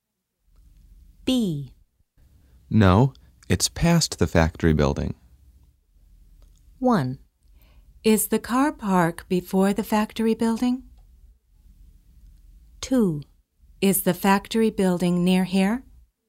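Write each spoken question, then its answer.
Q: No, it's past the factory building.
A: 1: Is the car park before the factory building?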